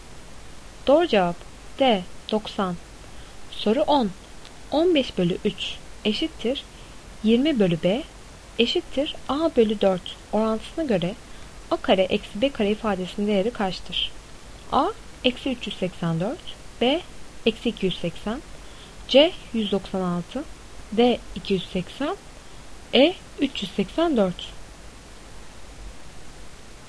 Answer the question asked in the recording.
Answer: Doğru cevap E 384.